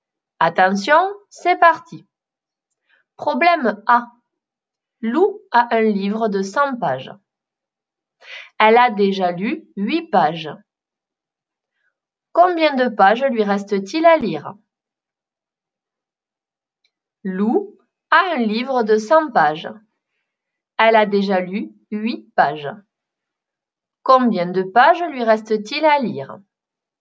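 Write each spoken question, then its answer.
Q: Combien de pages lui reste-t-il à lire?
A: 92 pages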